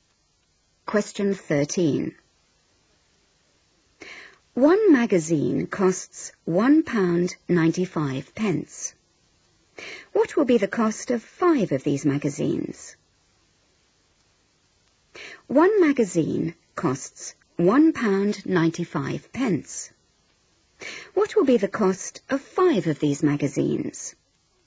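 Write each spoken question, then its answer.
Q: What will be the cost of 5 of these magazines?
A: £9.75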